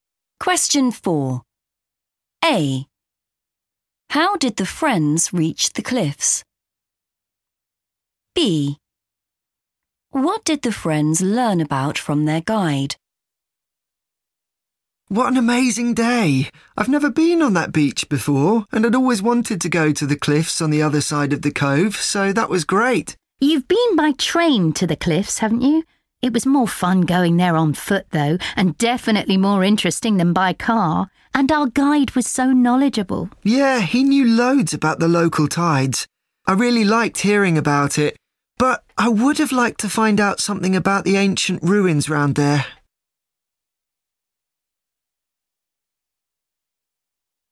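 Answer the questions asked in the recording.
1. on foot
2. the local tides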